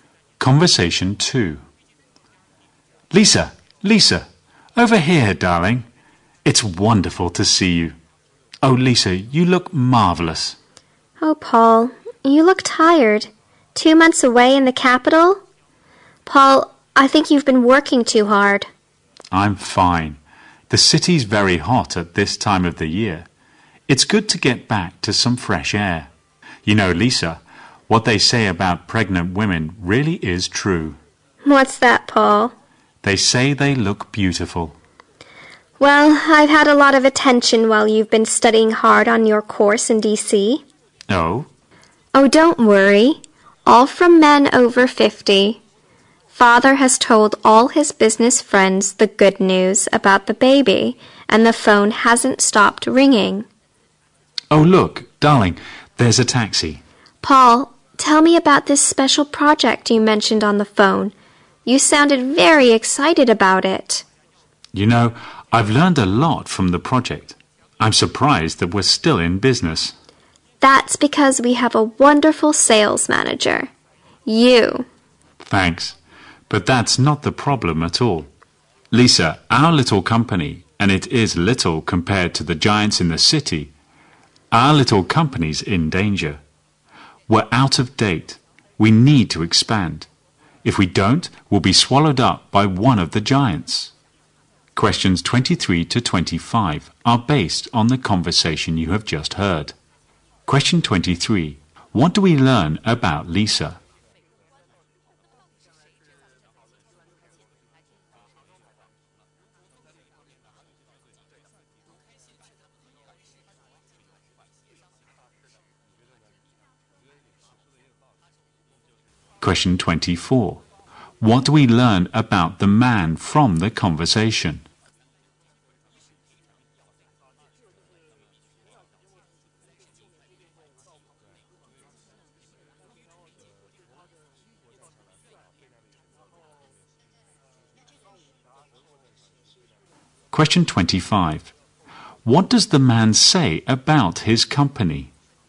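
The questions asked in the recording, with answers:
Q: What do we learn about Lisa?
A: She is pregnant.

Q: What do we learn about the man from the conversation?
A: He has just come back from two months studying on a course in D.C.

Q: What does the man say about his company?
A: It is small and in danger; it needs to expand.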